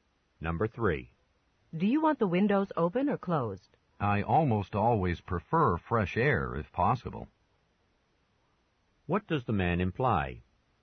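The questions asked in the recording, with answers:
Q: What does the man imply?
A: He would like the windows open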